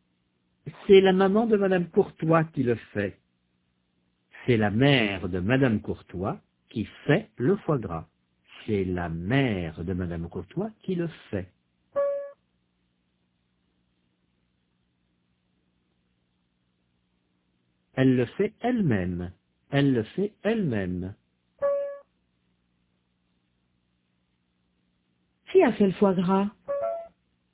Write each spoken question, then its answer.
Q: Qui a fait le foie gras?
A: La maman de madame Courtois.